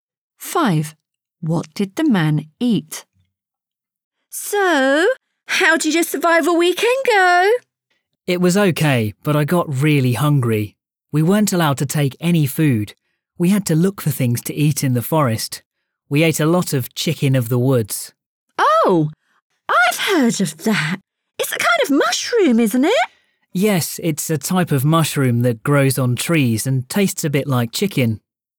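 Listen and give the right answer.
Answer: chicken of the woods (a mushroom that grows on trees)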